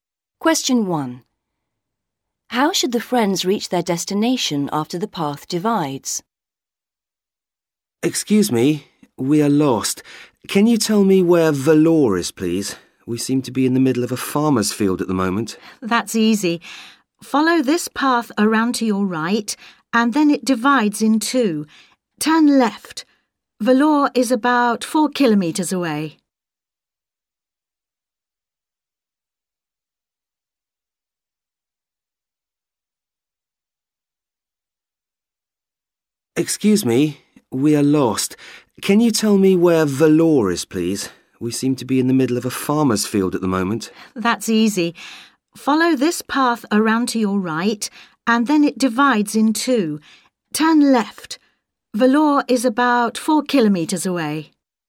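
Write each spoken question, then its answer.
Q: How should the friends reach their destination after the path divides?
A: Turn left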